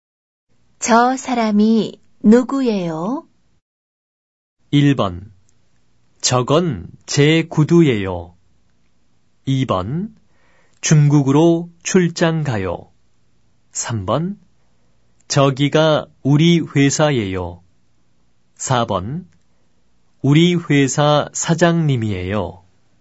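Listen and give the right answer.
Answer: 4: 우리 회사 사장님이에요.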